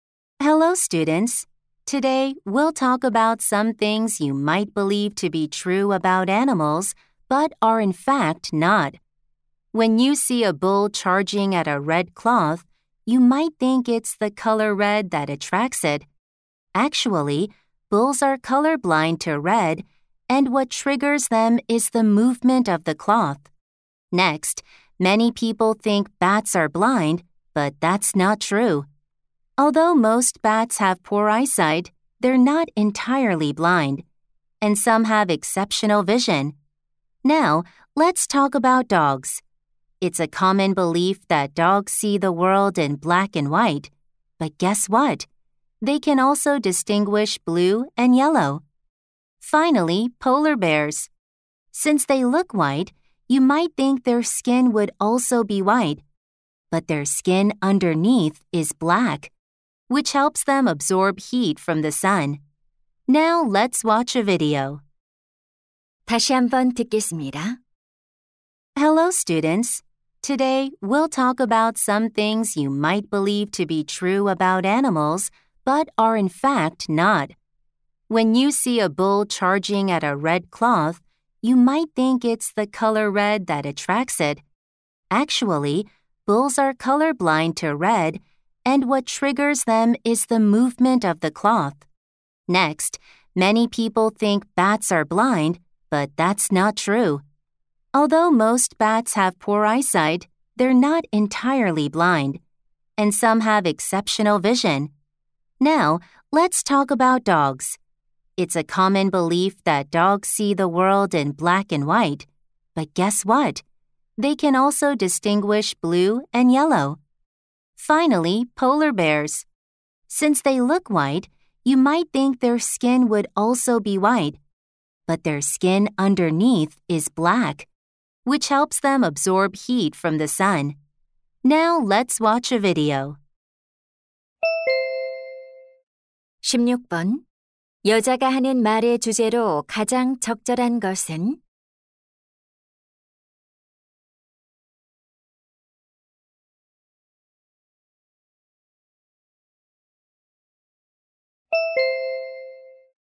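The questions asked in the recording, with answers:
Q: 여자가 하는 말의 주제로 가장 적절한 것은?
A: 동물에 관한 잘못된 통념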